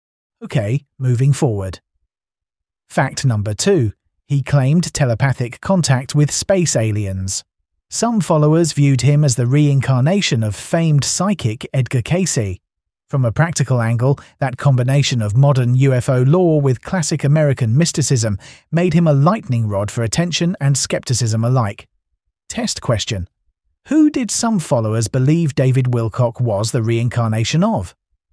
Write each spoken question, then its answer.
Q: Who did some followers believe David Wilcock was the reincarnation of?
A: Correct answer, Edgar Cayce.